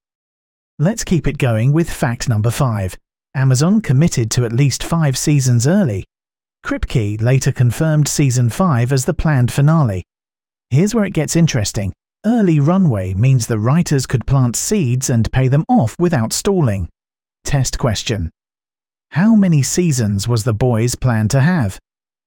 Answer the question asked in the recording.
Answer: Correct answer, 5.